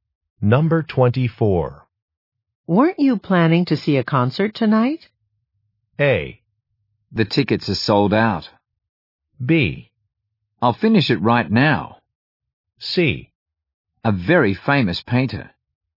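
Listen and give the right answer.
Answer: A: The tickets are sold out.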